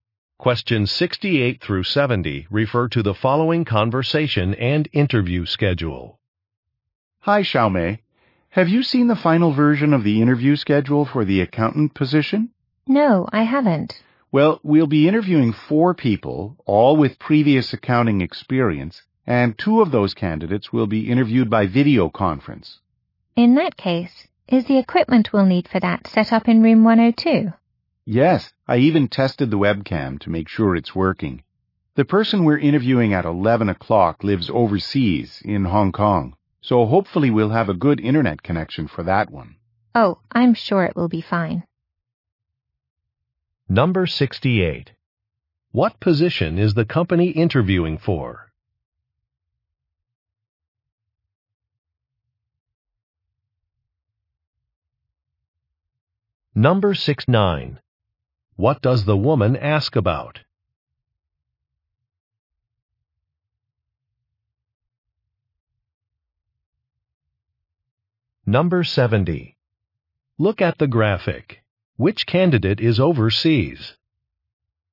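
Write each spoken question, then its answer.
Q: What position is the company interviewing for?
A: Accountant

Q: What does the woman ask about?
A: Whether the video conference equipment is set up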